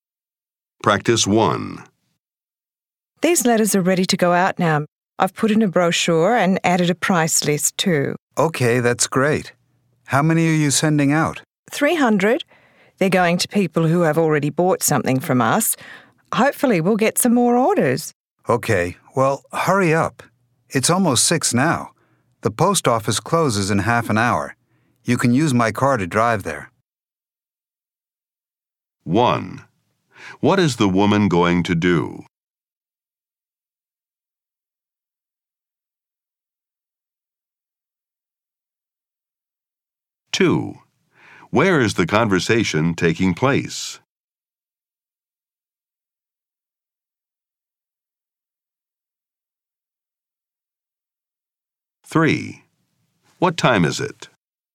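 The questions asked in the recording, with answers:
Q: What time is it?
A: Almost 6 o'clock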